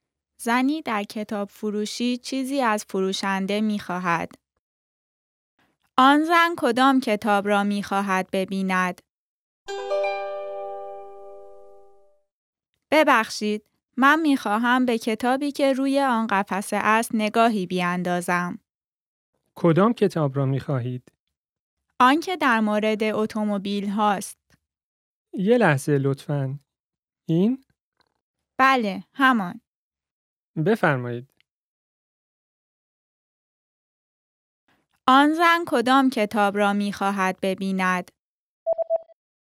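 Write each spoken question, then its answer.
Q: آن زن کدام کتاب را می خواهد ببیند؟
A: کتابی در مورد اتومبیل ها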